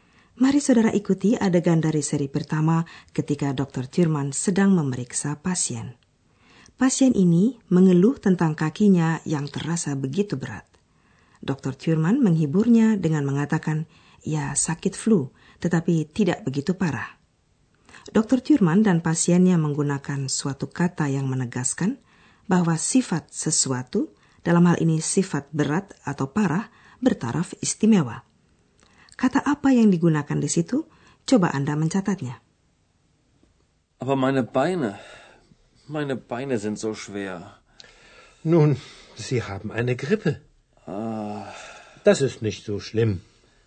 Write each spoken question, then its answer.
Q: Kata apa yang digunakan di situ?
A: Kata terakhir yang kita cari adalah zo.